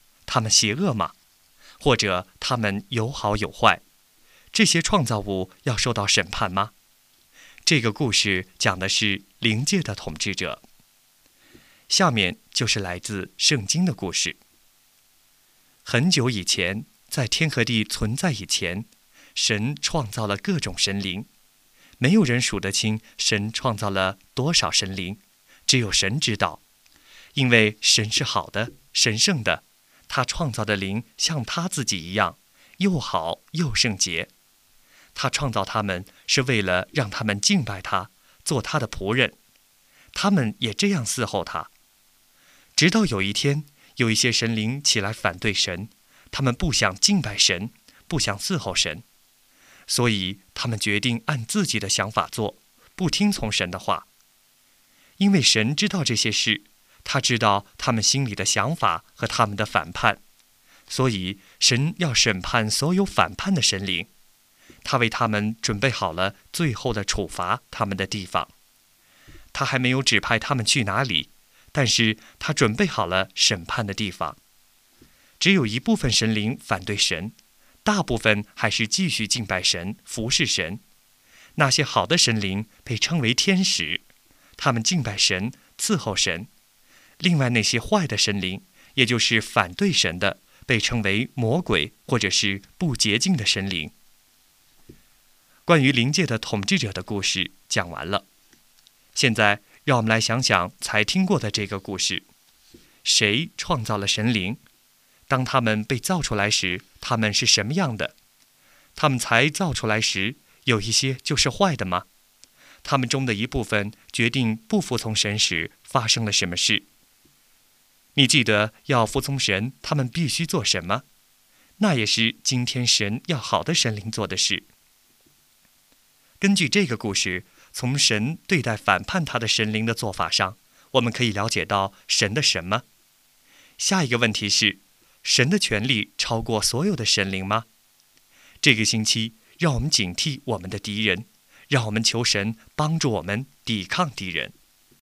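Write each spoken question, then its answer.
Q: 当他们被造出来时,他们是什么样的?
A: 又好又圣洁

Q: 他们才造出来时,有一些就是坏的吗?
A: 不是,都是好的

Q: 他们中的一部分决定不服从神时,发生了什么事?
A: 神要审判他们,为他们准备了处罚的地方

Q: 你记得要服从神,他们必须做什么?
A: 敬拜神,伺候神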